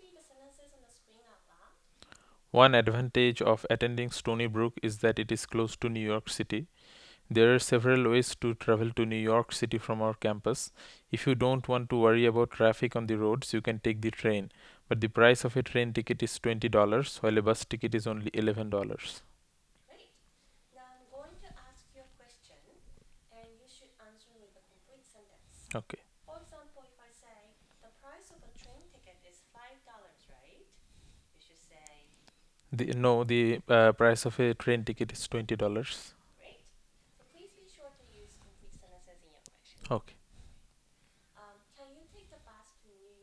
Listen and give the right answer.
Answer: Yes, I can take the bus to New York City.